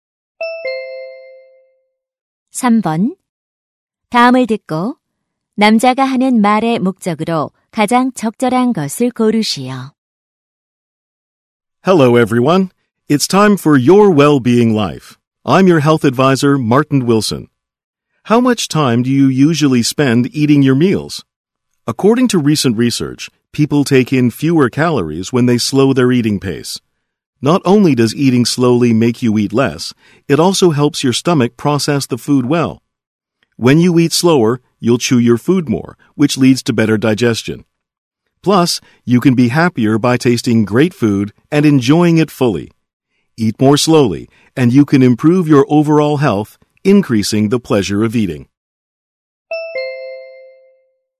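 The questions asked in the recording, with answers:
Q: 다음을 듣고 남자가 하는 말의 목적으로 가장 적절한 것을 고르시오.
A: 천천히 먹는 식습관을 권장하려고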